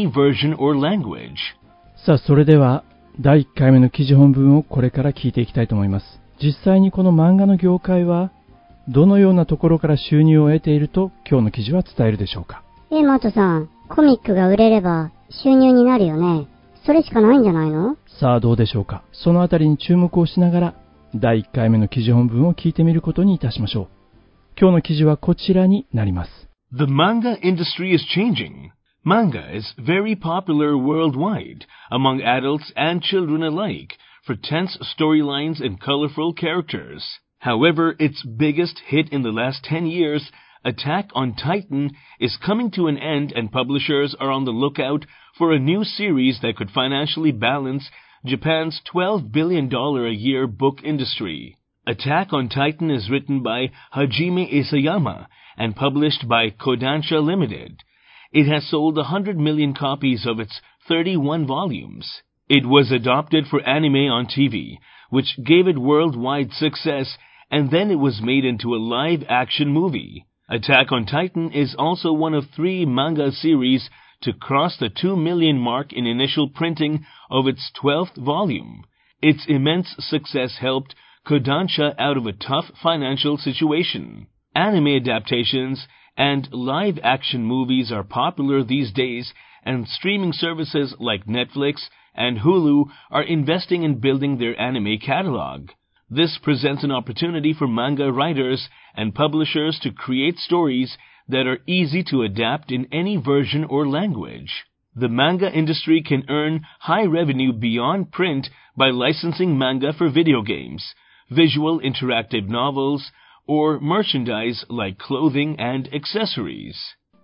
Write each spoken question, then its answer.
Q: 実際にこの漫画の業界はどのようなところから収入を得ていると今日の記事は伝えるでしょうか。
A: The manga industry can earn high revenue beyond print by licensing manga for video games, visual interactive novels, or merchandise like clothing and accessories.